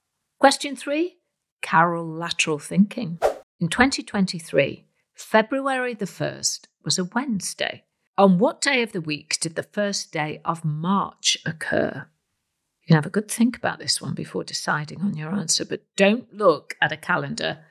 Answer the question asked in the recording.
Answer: Well, the 1st of March was also on a Wednesday, because there are 28 days in February in a non leap year.